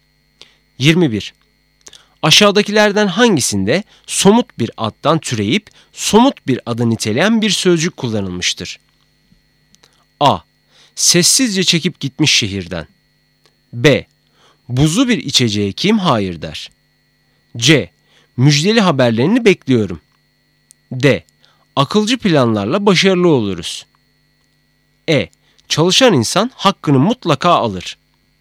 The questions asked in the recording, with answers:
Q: Aşağıdakilerden hangisinde somut bir addan türeyip somut bir adı niteleyen bir sözcük kullanılmıştır?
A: Doğru cevap B.